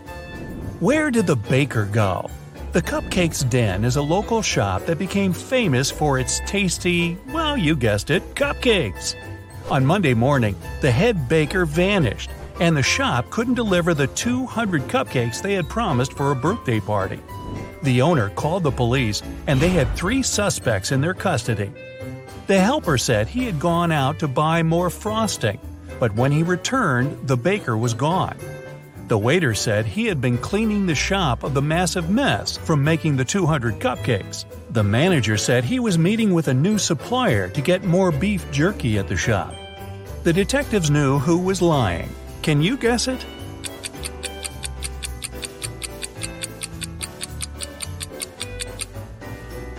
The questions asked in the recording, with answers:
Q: Can you guess it?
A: It's the manager. Who needs beef jerky at a cupcake shop?